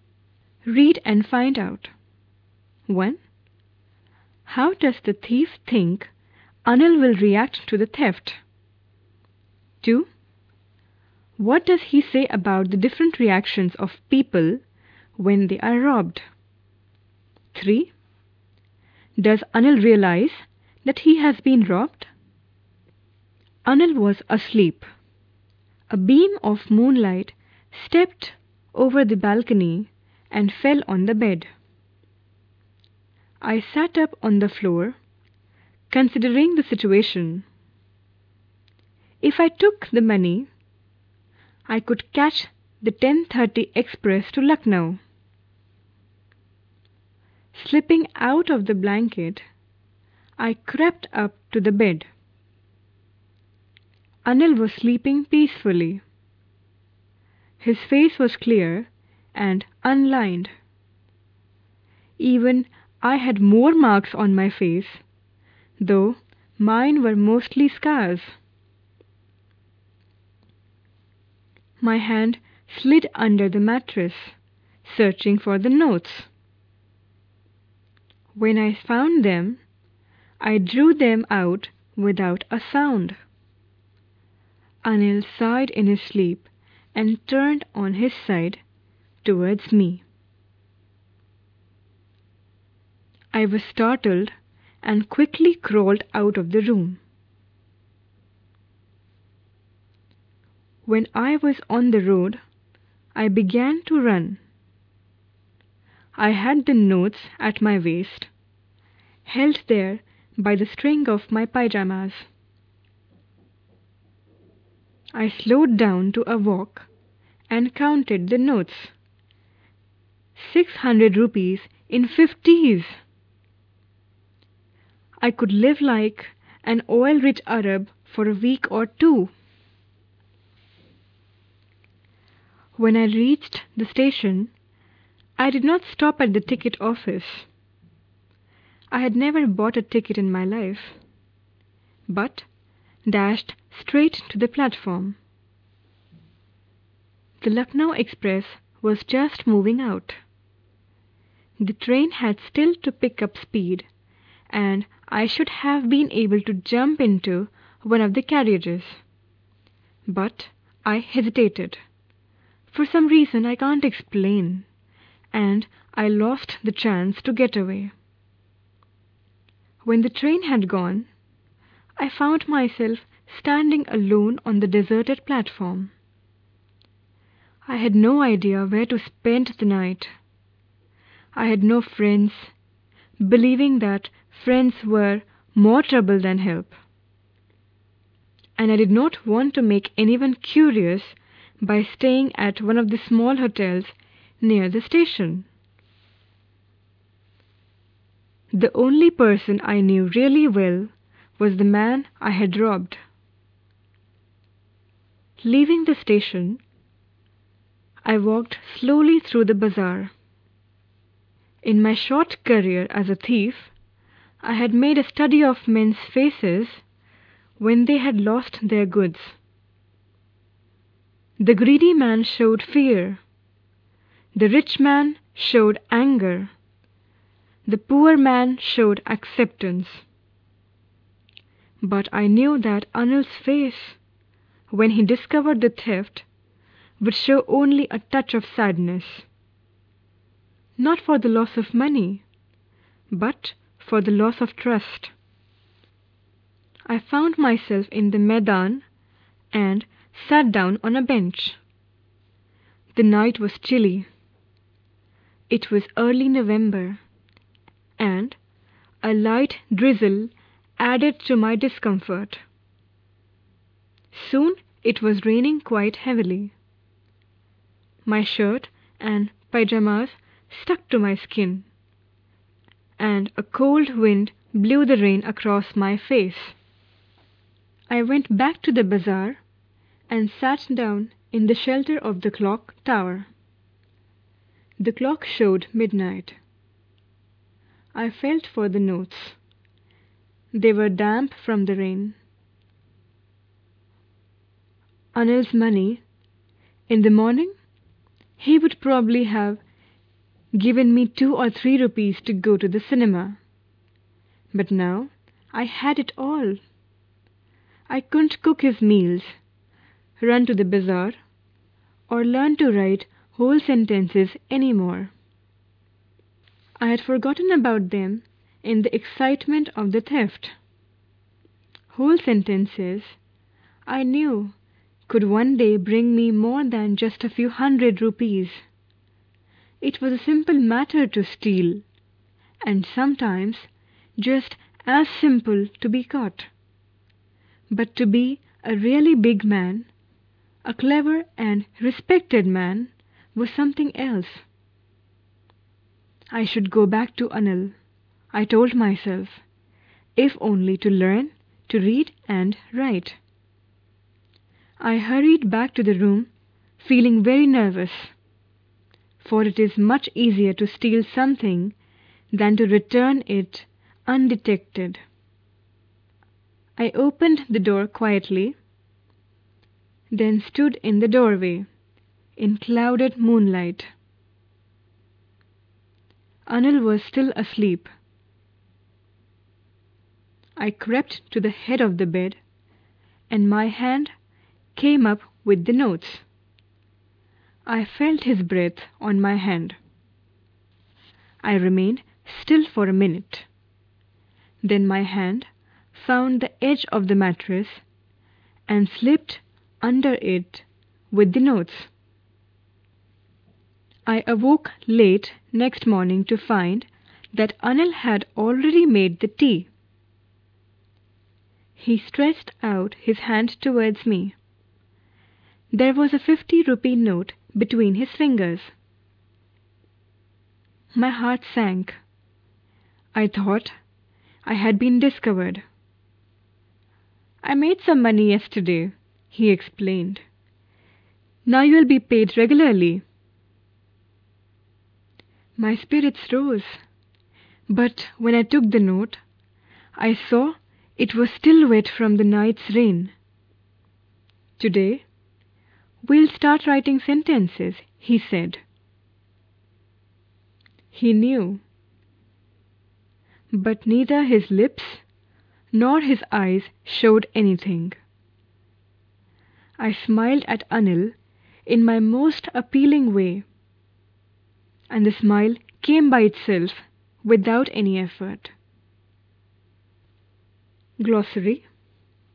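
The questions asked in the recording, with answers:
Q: How does the thief think Anil will react to the theft?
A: With only a touch of sadness, for the loss of trust, not the money

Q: What does he say about the different reactions of people when they are robbed?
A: The greedy man shows fear, the rich man anger, the poor man acceptance

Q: Does Anil realize that he has been robbed?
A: Yes, he knew (the note was still wet), but showed nothing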